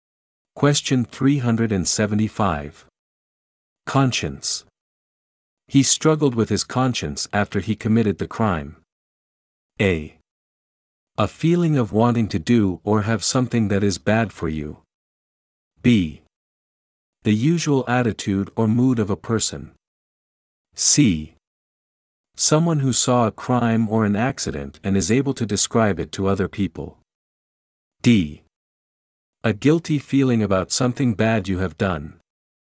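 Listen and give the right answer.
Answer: D: A guilty feeling about something bad you have done.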